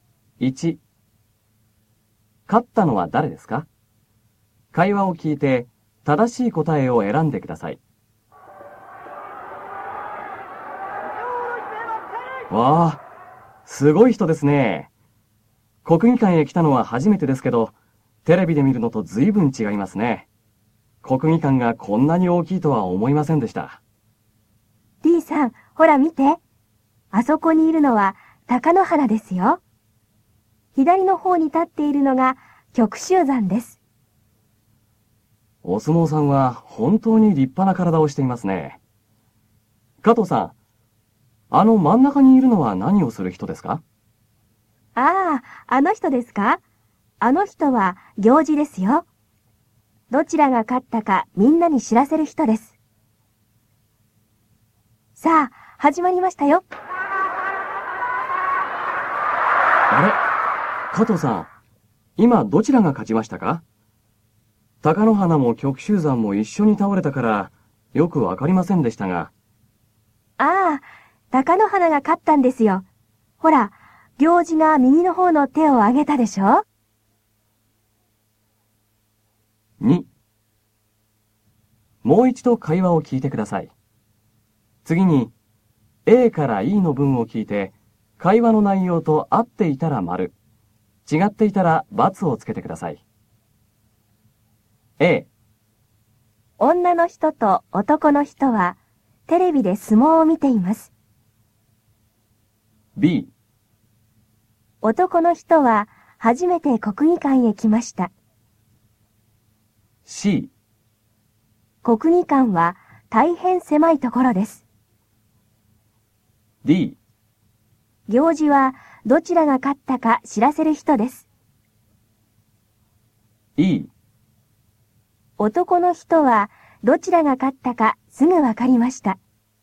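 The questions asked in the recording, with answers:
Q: 勝ったのは誰ですか?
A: 貴乃花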